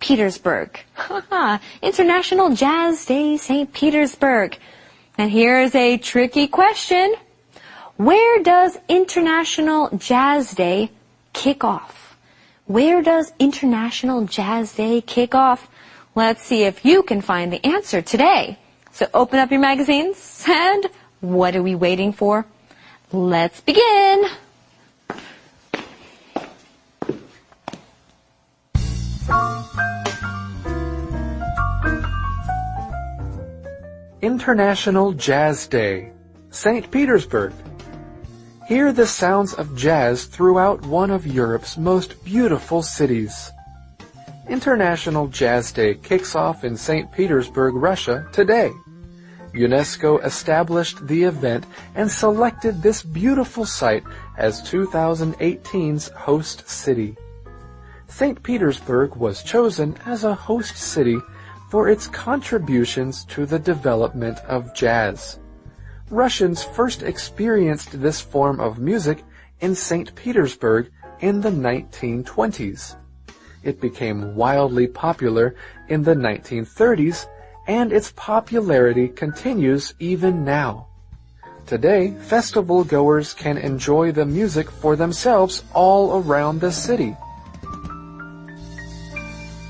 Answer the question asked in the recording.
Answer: In St. Petersburg.